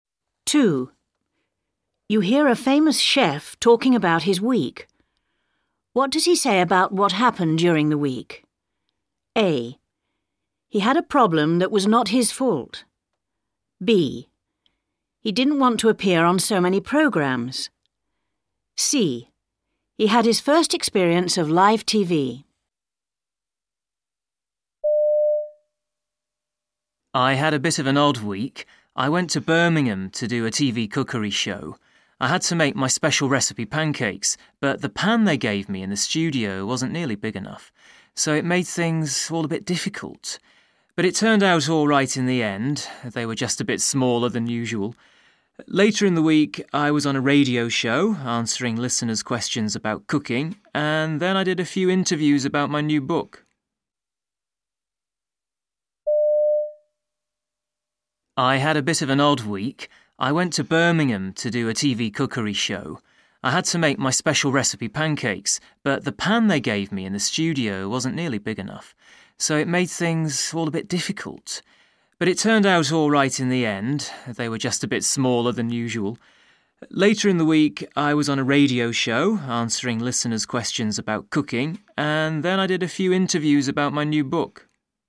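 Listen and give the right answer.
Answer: A: He had a problem that was not his fault.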